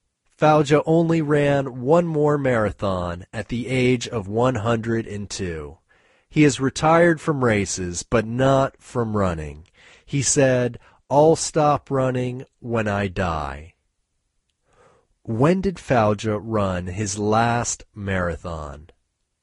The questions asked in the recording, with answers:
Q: When did Fauja run his last marathon?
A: He ran his last marathon at the age of 102.